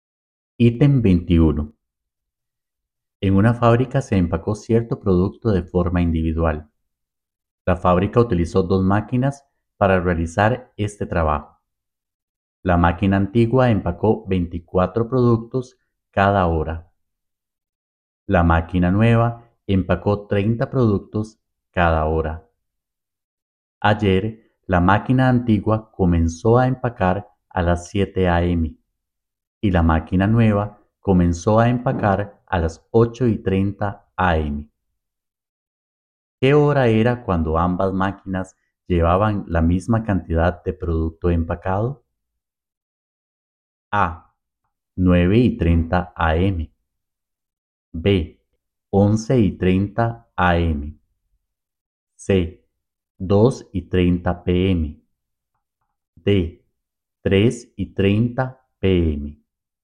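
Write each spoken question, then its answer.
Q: ¿Qué hora era cuando ambas máquinas llevaban la misma cantidad de producto empacado?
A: C: 2:30 p.m.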